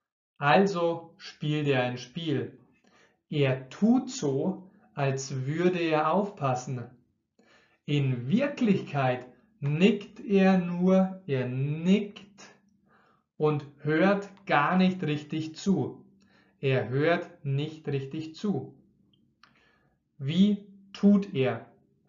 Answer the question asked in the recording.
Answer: Er tut so, als würde er aufpassen.